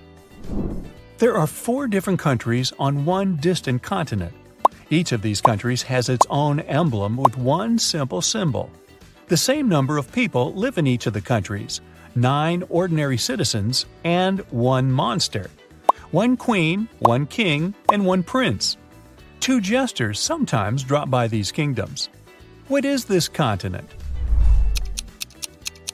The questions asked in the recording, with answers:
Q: What is this continent?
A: It's a deck of cards.